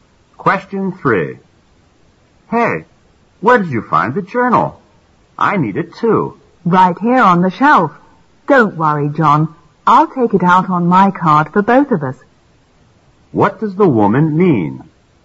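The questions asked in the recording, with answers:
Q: What does the woman mean?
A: She will check out the journal on her card so they can both use it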